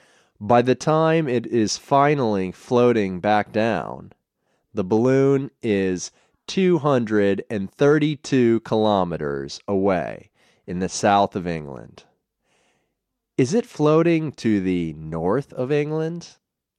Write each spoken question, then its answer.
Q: Is it floating to the north of England?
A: No, it's not floating to the north of England.